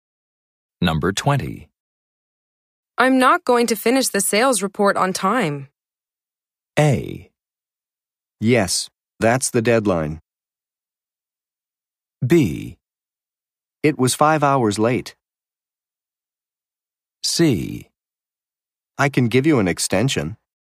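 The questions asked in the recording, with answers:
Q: I'm not going to finish the sales report on time.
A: C: I can give you an extension.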